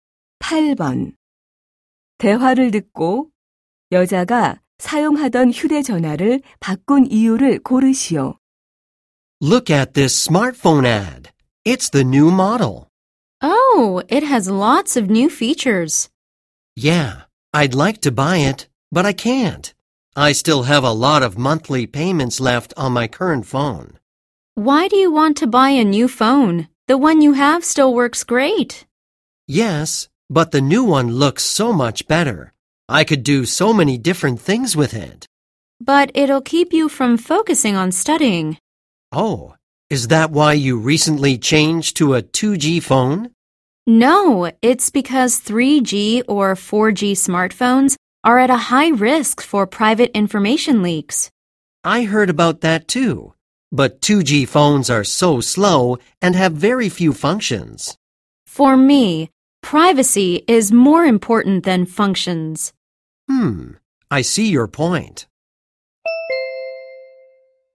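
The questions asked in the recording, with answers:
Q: 대화를 듣고 여자가 사용하던 휴대전화를 바꾼 이유를 고르시오.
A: 개인정보 유출 위험 때문에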